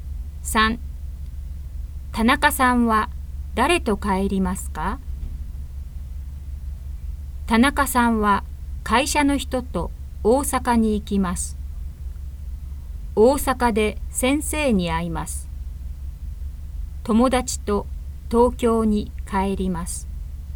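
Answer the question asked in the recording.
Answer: 友達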